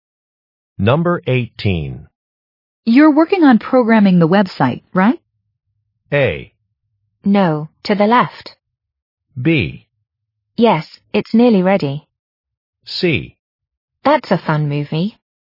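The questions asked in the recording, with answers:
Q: You're working on programming the website, right?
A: B: Yes, it's nearly ready.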